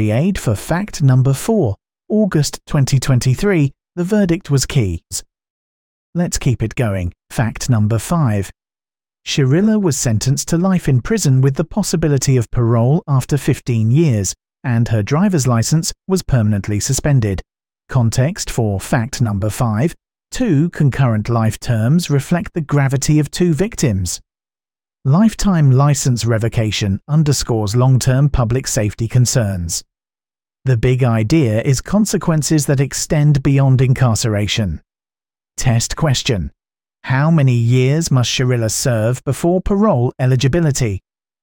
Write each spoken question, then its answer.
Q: How many years must Shirilla serve before parole eligibility?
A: Correct answer, 15 years.